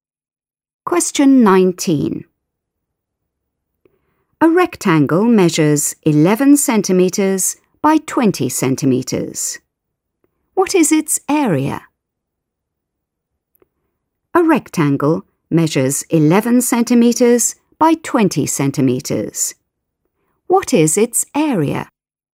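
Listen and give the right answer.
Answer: 220 square centimetres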